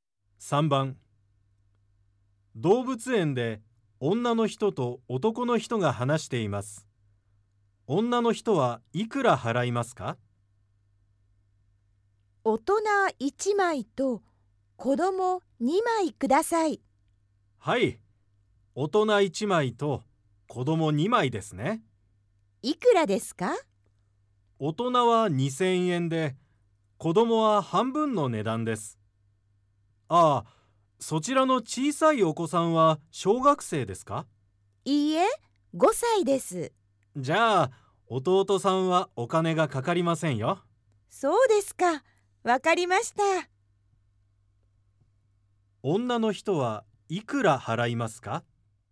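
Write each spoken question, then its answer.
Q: 女の人はいくら払いますか?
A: 3000円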